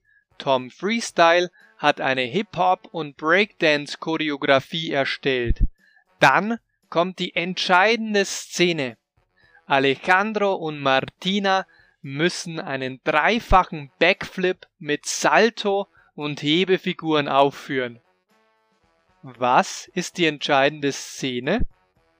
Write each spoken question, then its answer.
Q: Was ist die entscheidende Szene?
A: Die entscheidende Szene ist mit Alejandro und Martina.